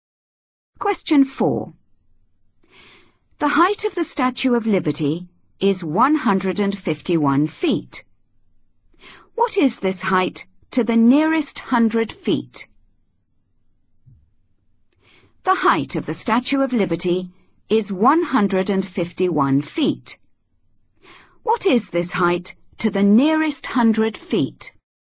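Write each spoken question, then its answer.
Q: What is this height to the nearest 100 feet?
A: 200 feet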